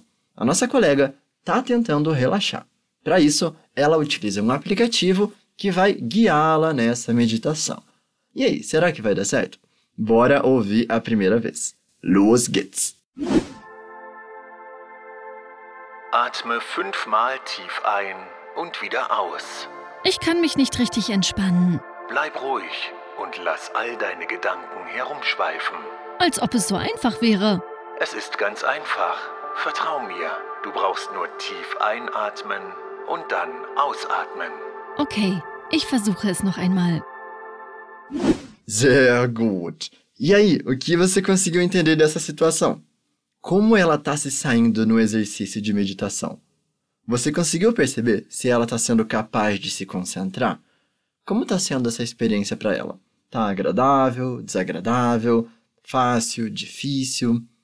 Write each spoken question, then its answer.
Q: Como ela está se saindo no exercício de meditação?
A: Só que a nossa colega, que vamos chamar de Anne, não está conseguindo relaxar muito bem.

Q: Você conseguiu perceber se ela está sendo capaz de se concentrar?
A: Por isso ela fala: Ich kann mich nicht richtig entspannen.